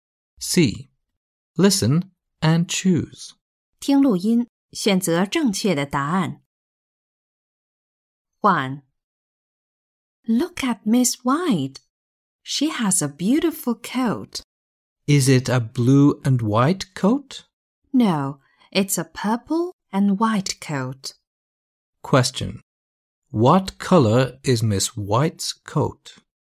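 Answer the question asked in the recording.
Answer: purple and white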